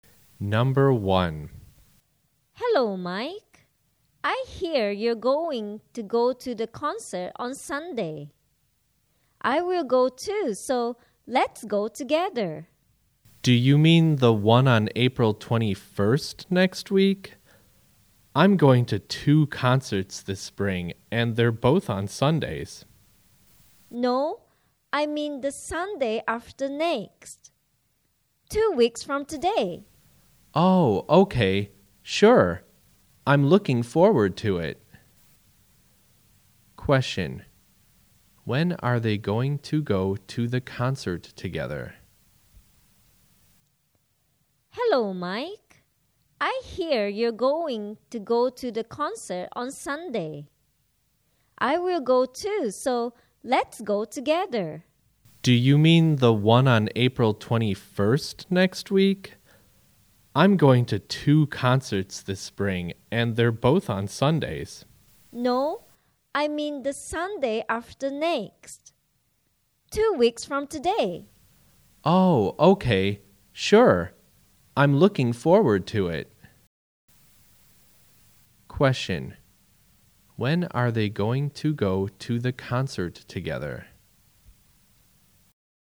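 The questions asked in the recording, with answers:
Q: When are they going to go to the concert together?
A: On the Sunday after next, two weeks from today (April 28th)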